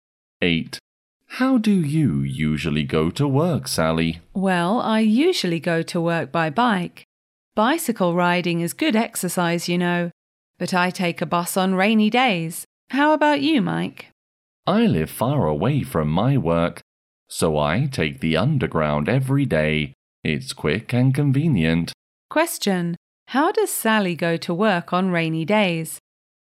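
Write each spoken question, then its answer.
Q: How does Sally go to work on rainy days?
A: By bus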